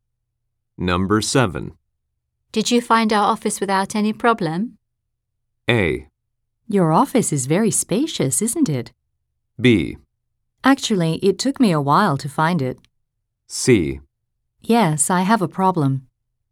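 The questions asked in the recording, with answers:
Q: Did you find our office without any problem?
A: B: Actually, it took me a while to find it.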